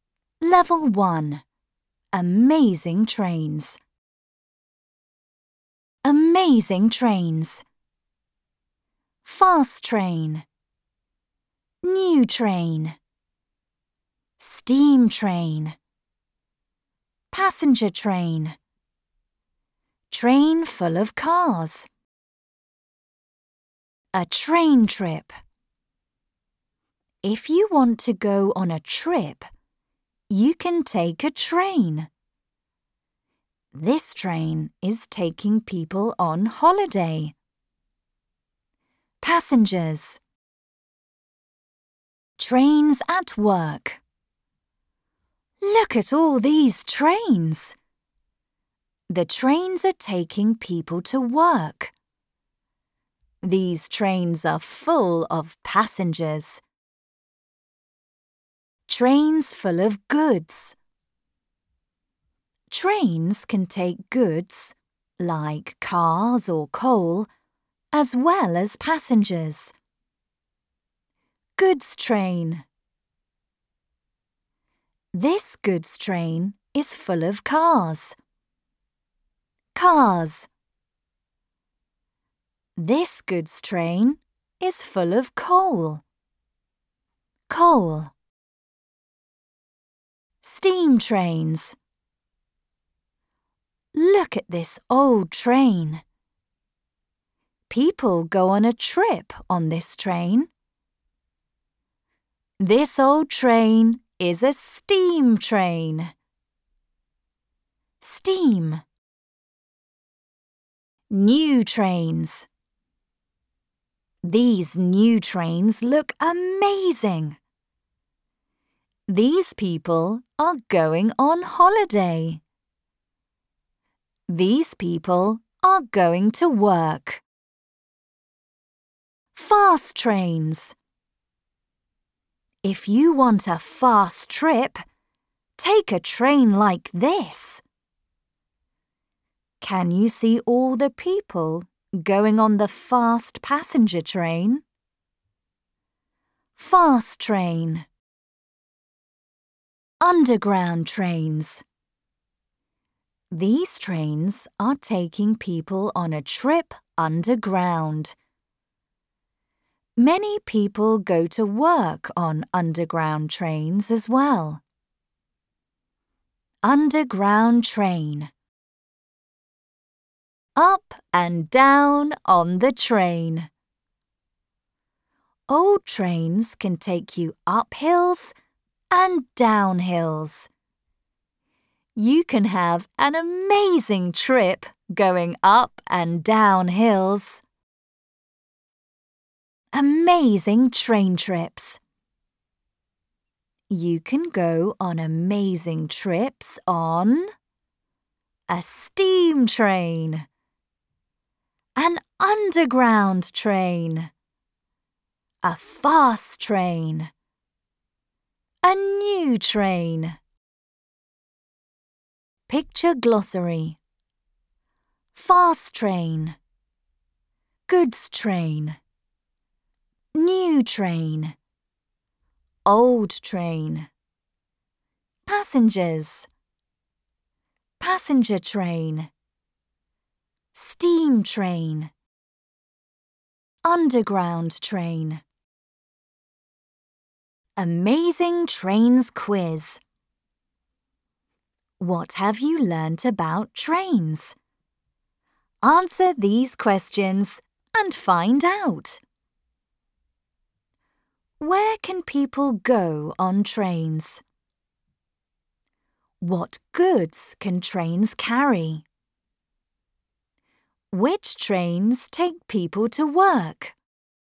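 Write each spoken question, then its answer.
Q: Where can people go on trains?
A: On holiday, to work, or on a trip

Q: What goods can trains carry?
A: Cars or coal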